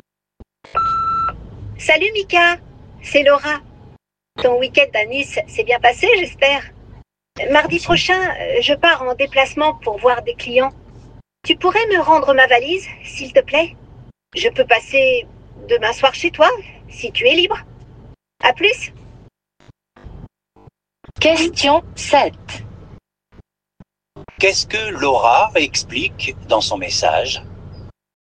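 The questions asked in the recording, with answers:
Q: Qu'est-ce que Laura explique dans son message?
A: Elle a besoin de récupérer sa valise pour un déplacement professionnel mardi prochain.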